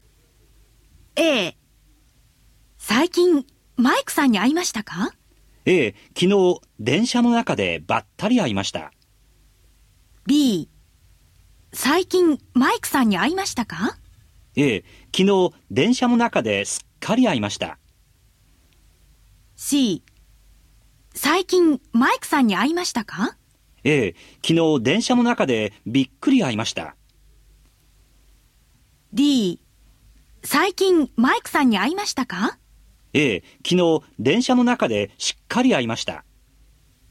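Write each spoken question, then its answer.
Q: 最近マイクさんに会いましたか?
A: A: 昨日電車の中でばったり会いました。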